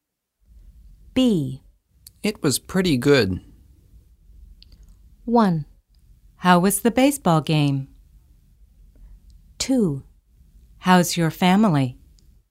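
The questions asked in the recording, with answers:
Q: It was pretty good.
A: 1: How was the baseball game?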